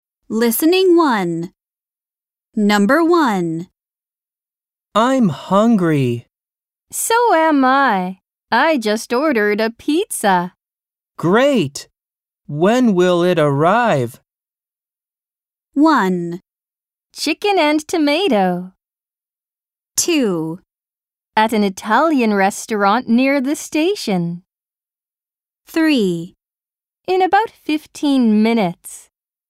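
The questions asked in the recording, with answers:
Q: When will it arrive?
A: 3: In about 15 minutes.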